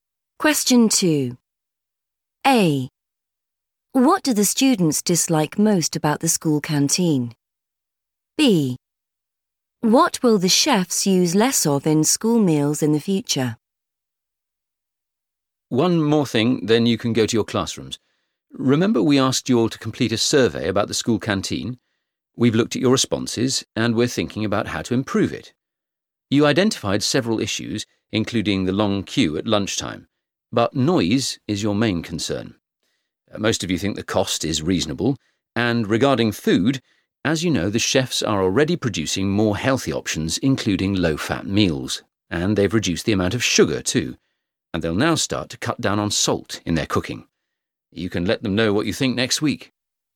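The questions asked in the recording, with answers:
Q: What do the students dislike most about the school canteen?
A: noise

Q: What will the chefs use less of in school meals in the future?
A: salt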